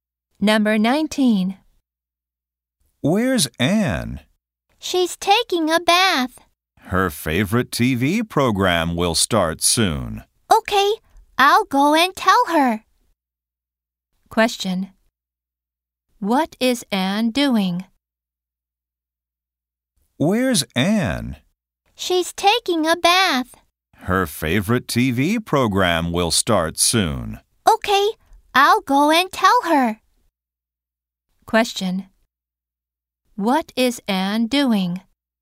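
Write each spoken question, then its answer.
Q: Question. What is Anne doing?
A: Taking a bath.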